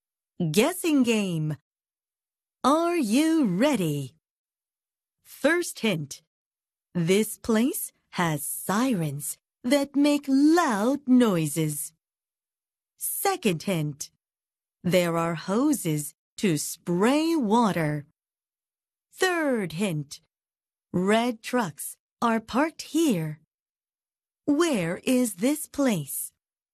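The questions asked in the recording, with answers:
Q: Where is this place?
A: A fire station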